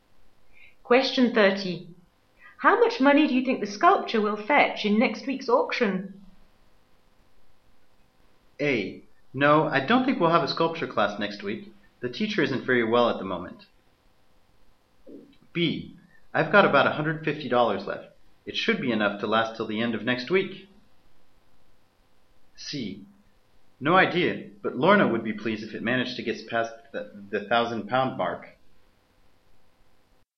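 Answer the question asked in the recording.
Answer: C: No idea, but Lorna would be pleased if it managed to get past the 1,000-pound mark.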